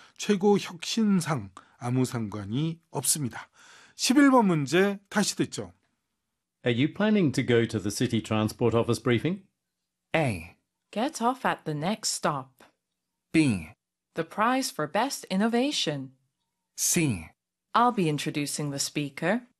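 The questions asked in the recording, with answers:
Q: Are you planning to go to the city transport office briefing?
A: C: I'll be introducing the speaker.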